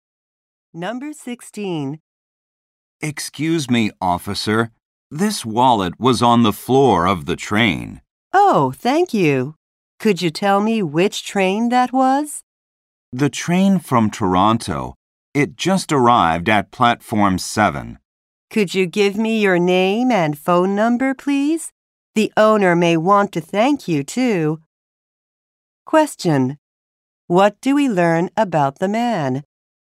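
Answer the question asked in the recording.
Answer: He found a wallet on the train.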